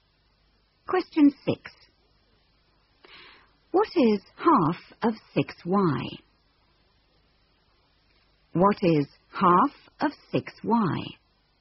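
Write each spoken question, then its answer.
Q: What is half of 6y?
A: 3y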